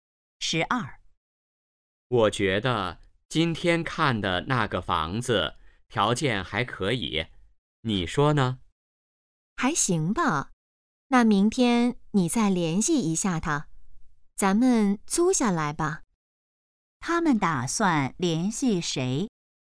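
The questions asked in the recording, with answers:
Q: 他们打算联系谁?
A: 房东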